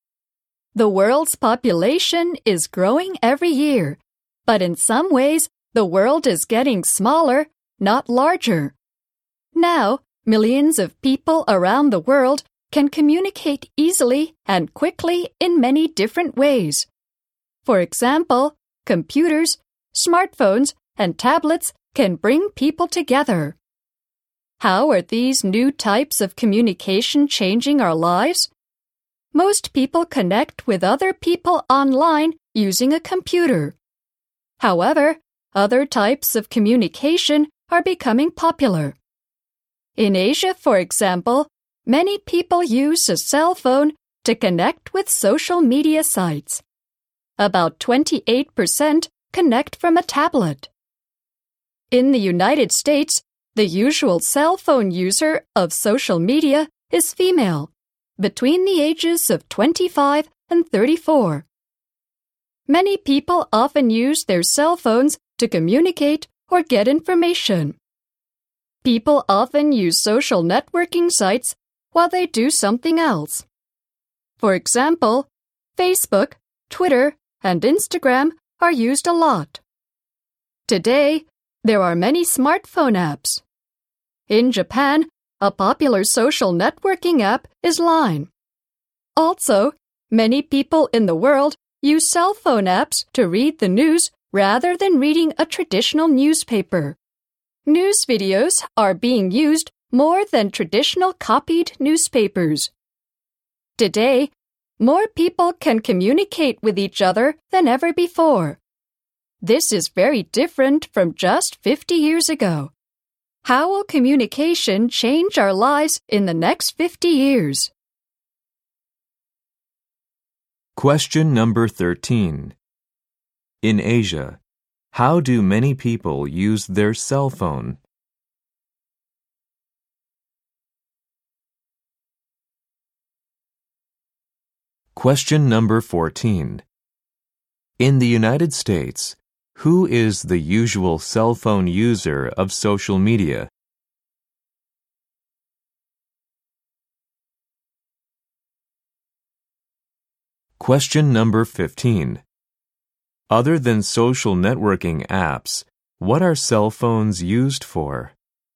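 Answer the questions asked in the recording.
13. To connect with social media sites
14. A woman aged 25 to 34
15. Reading the news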